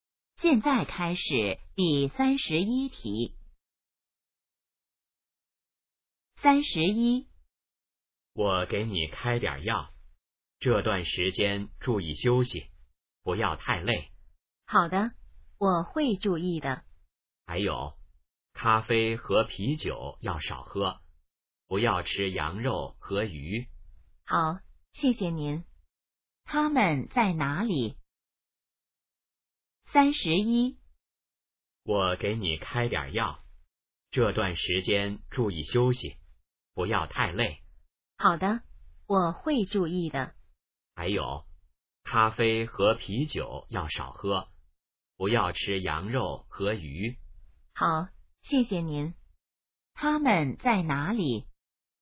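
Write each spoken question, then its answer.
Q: 他们在哪里?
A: 医院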